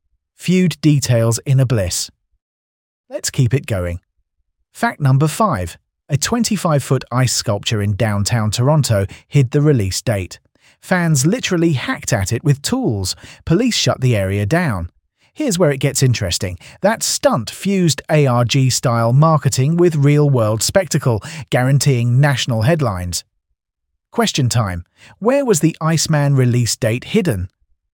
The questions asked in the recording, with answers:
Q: Where was the Iceman release date hidden?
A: Correct answer. Inside a 25-foot ice sculpture.